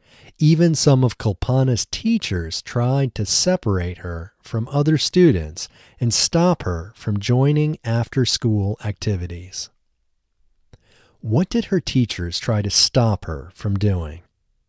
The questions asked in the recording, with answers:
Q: What did her teachers try to stop her from doing?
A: They tried to stop her from joining after-school activities.